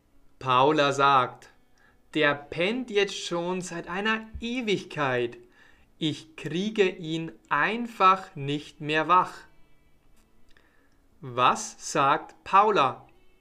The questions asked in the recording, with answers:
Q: Was sagt Paula?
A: Sie sagt, der pennt jetzt schon seit einer Ewigkeit.